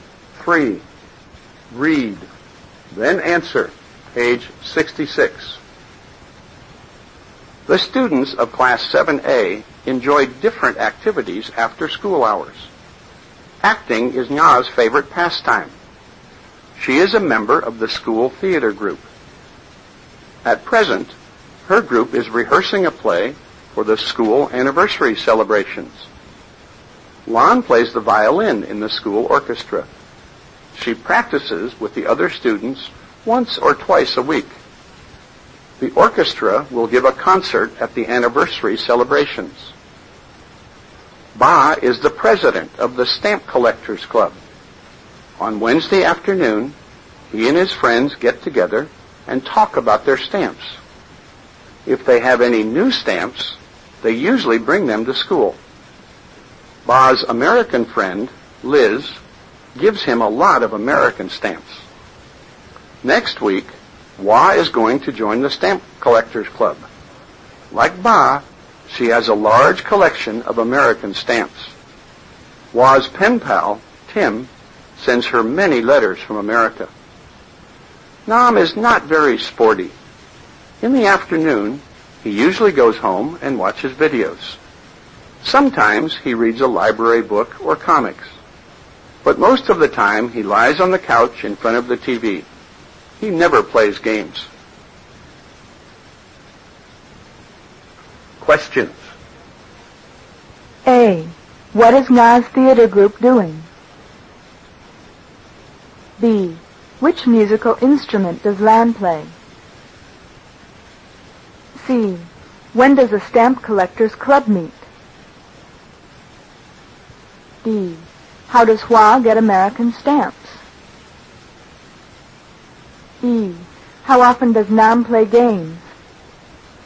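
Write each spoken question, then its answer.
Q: What is Nas Theater Group doing?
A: Rehearsing a play for the school anniversary celebrations

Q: Which musical instrument does Lan play?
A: The violin

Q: When does a stamp collector's club meet?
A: On Wednesday afternoon

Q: How does Hua get American stamps?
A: Her pen pal Tim sends her letters from America

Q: How often does Nam play games?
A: Never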